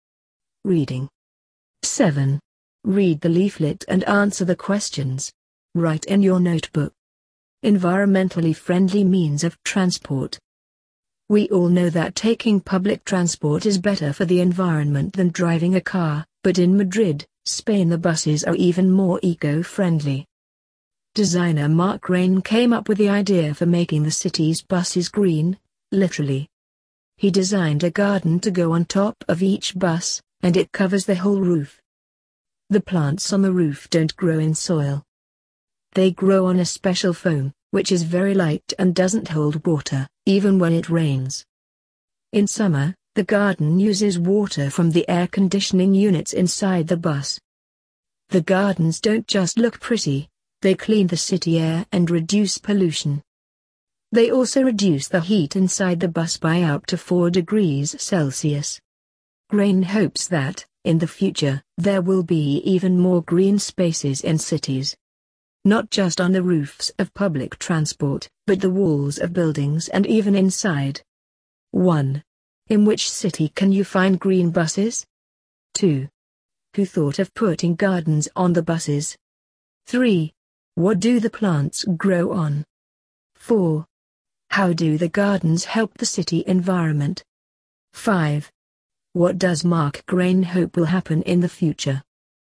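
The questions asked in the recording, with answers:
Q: In which city can you find green buses?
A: Madrid

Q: Who thought of putting gardens on the buses?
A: Designer Marc Rein

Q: What do the plants grow on?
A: A special foam

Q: How do the gardens help the city environment?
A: They clean the city air and reduce pollution

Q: What does Marc Rein hope will happen in the future?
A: There will be more green spaces in cities, on roofs of public transport, walls of buildings and even inside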